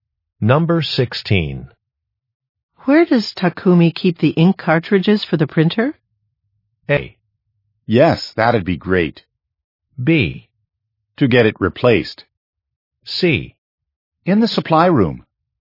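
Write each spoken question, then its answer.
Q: Where does Takumi keep the ink cartridges for the printer?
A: C: In the supply room.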